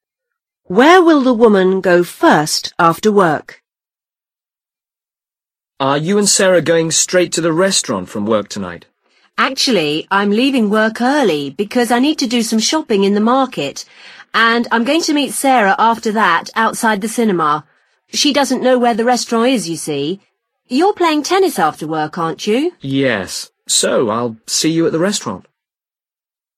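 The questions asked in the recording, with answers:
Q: Where will the woman go first after work?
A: to the market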